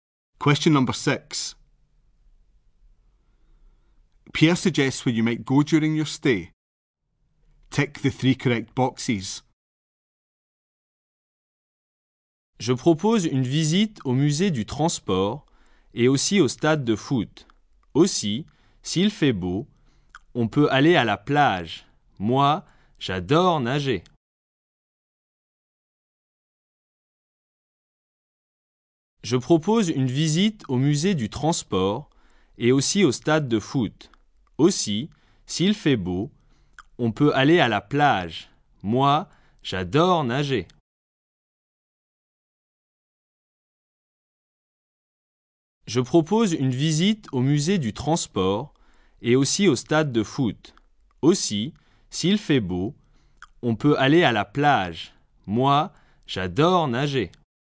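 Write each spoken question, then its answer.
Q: Pierre suggests where you might go during your stay.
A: The transport museum, the football stadium and the beach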